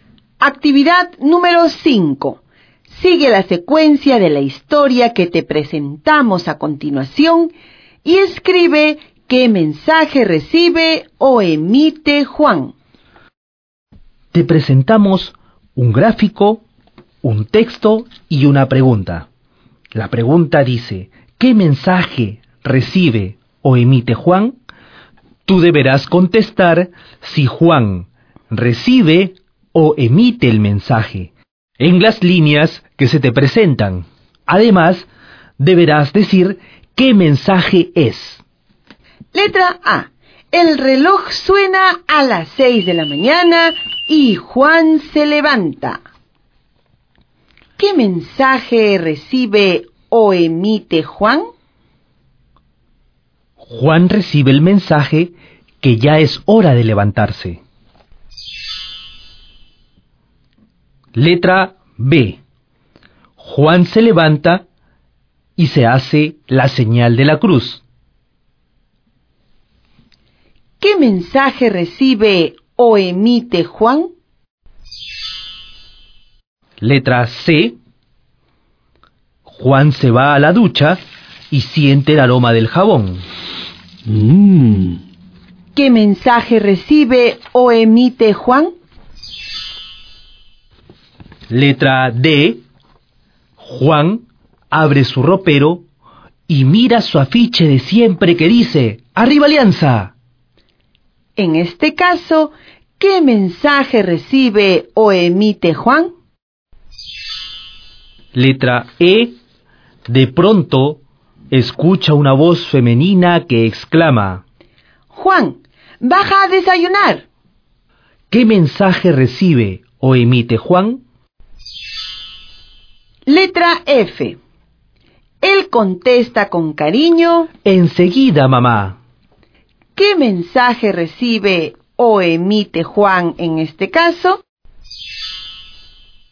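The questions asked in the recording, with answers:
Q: ¿Qué mensaje recibe o emite Juan?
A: Recibe el mensaje de que debe bajar a desayunar

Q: ¿Qué mensaje recibe o emite Juan en este caso?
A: Emite el mensaje de que irá enseguida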